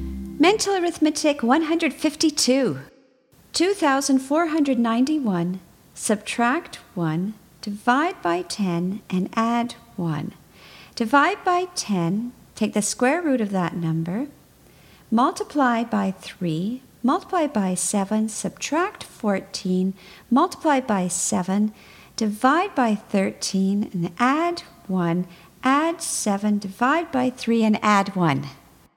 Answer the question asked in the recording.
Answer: And the answer is 20.